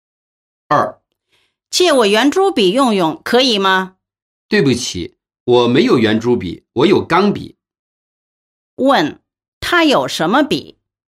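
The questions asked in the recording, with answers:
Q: 他有什么笔?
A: 钢笔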